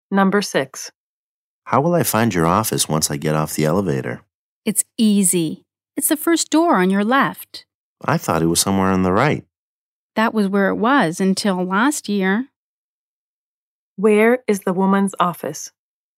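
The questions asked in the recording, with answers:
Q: Where is the woman's office?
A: The first door on the left after getting off the elevator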